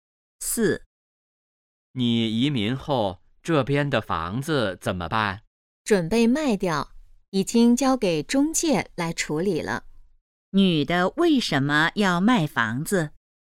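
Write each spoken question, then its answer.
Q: 女的为什么要卖房子?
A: 她要移民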